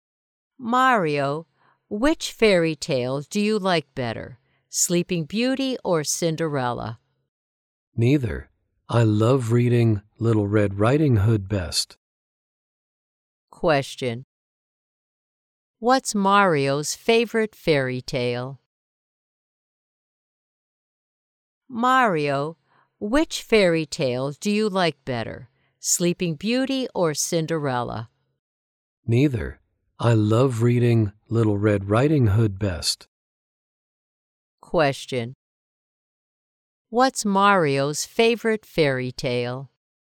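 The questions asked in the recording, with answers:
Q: What's Mario's favorite fairy tale?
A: Little Red Riding Hood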